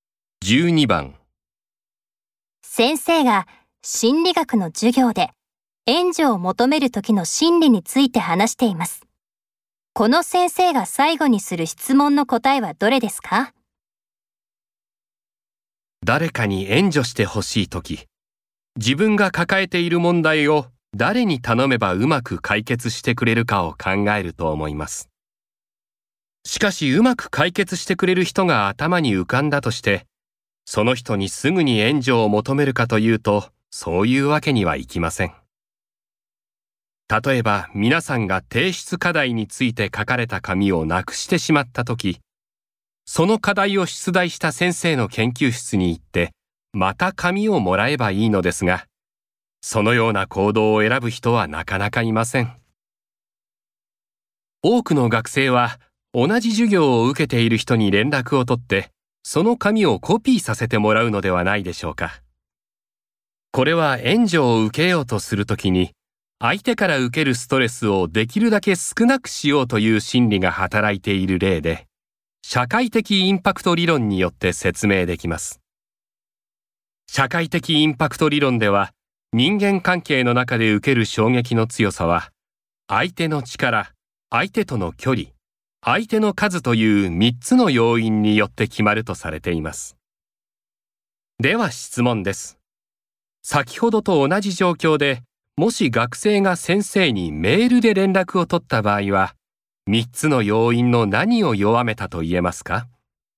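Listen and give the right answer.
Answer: 相手との距離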